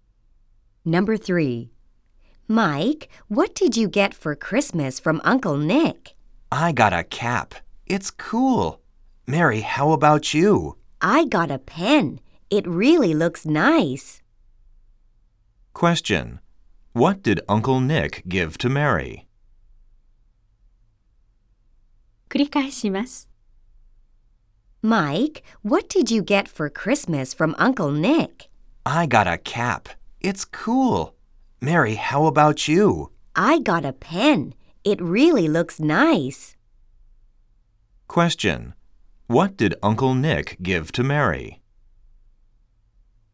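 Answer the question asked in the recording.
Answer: A pen.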